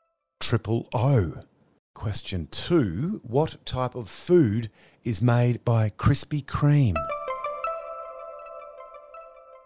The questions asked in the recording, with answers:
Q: What type of food is made by Krispy Kreme?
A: Donuts.